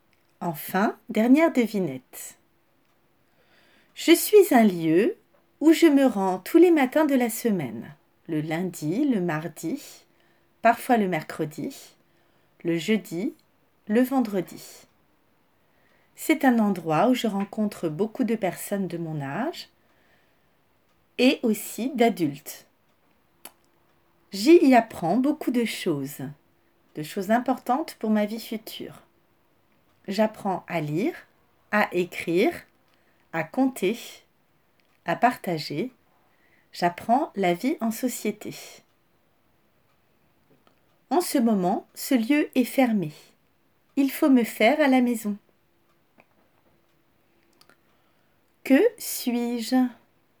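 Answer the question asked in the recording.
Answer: l'école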